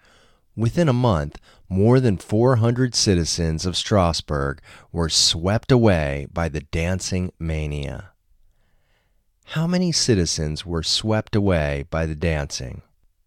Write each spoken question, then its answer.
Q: How many citizens were swept away by the dancing?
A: More than 400 citizens were swept away by the dancing.